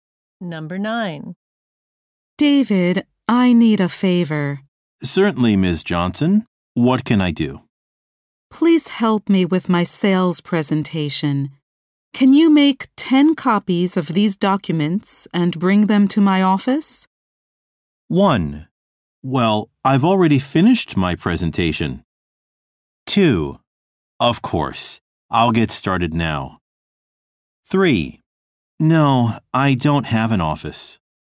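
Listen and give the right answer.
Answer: 2: Of course, I'll get started now.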